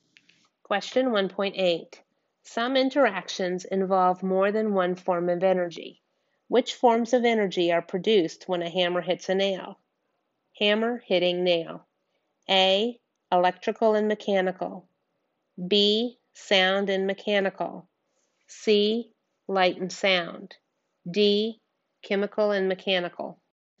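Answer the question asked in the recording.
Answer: B: Sound and mechanical.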